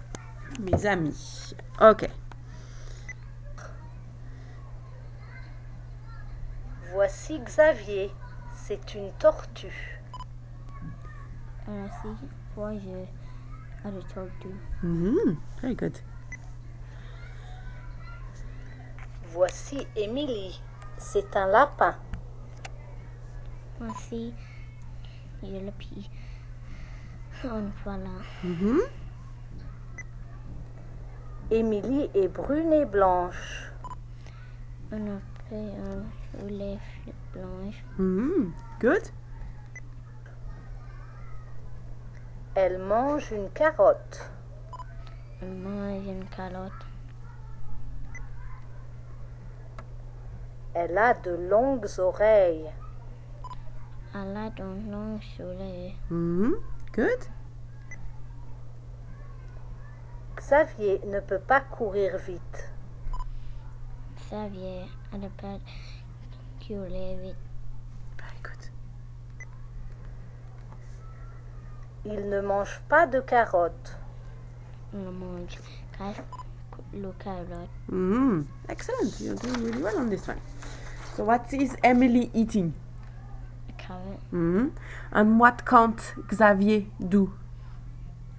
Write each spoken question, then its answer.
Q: So what is Emily eating?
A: A carrot.